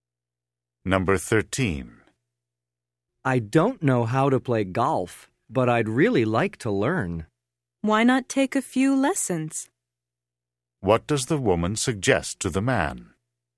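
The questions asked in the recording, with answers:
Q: What does the woman suggest to the man?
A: Taking a few golf lessons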